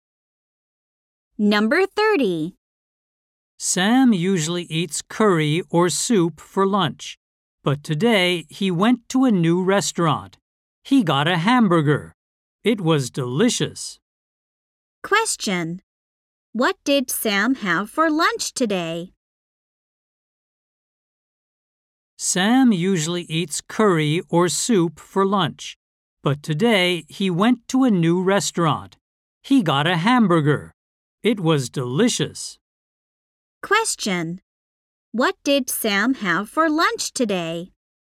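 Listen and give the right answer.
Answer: A hamburger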